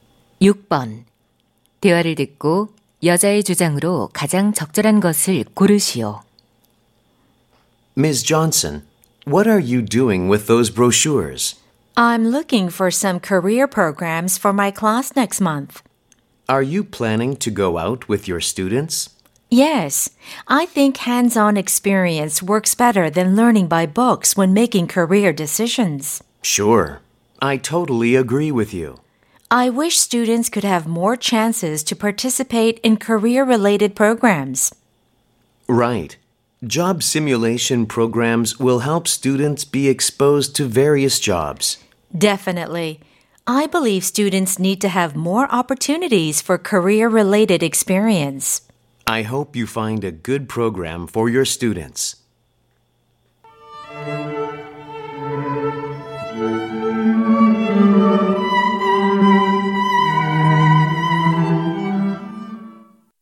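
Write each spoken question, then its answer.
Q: 대화를 듣고 여자의 주장으로 가장 적절한 것을 고르시오.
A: 학생들에게 진로 관련 체험 기회가 더 필요하다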